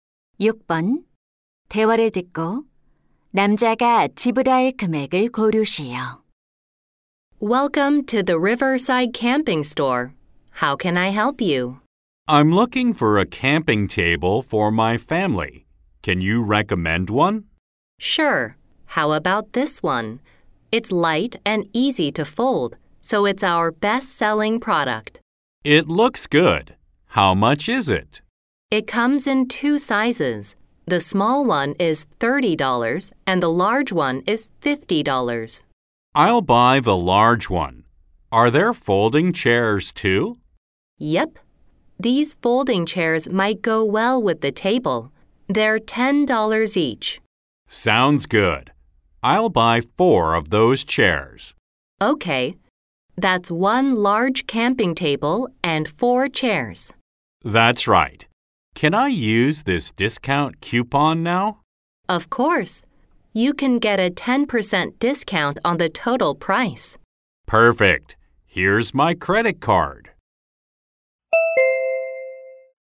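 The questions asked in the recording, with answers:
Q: 대화를 듣고 남자가 지불할 금액을 고르시오.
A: 81달러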